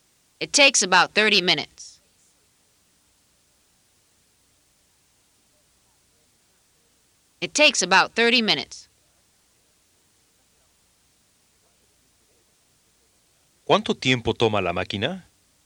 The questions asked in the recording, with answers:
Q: ¿Cuánto tiempo toma la máquina?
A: It takes about 30 minutes.